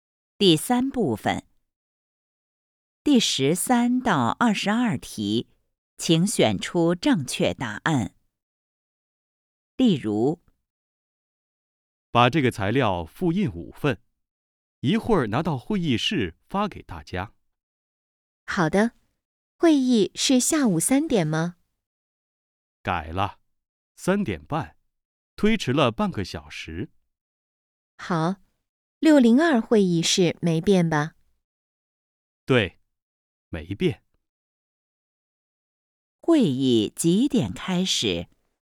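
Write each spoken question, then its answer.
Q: 会议几点开始?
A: 3点半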